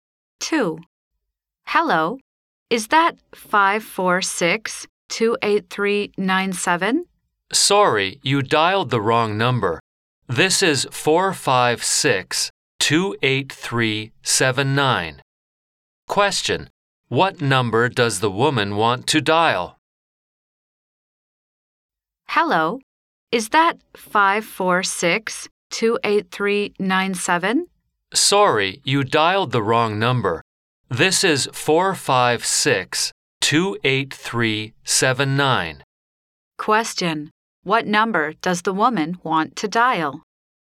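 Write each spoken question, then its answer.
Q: what number does the woman want to dial?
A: 546-28397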